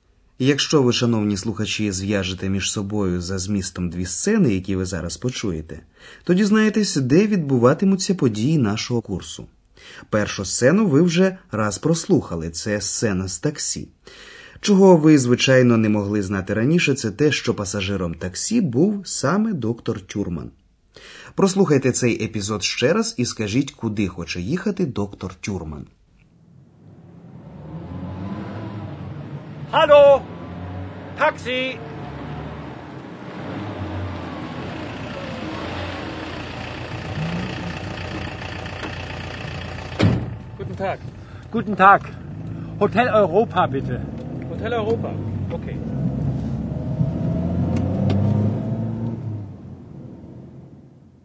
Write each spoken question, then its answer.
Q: Прослухайте цей епізод ще раз і скажіть, куди хоче їхати доктор Тюрман.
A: Доктор Тюрман просить водія таксі відвести його до готелю «Європа».